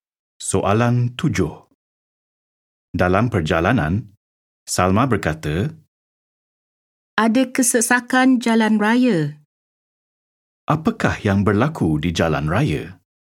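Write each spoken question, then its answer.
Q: Apakah yang berlaku di jalan raya?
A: Kesesakan jalan raya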